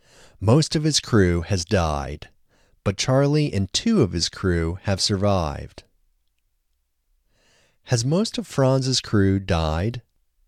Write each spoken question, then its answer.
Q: Has most of Franz's crew died?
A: No, most of Franz's crew hasn't died.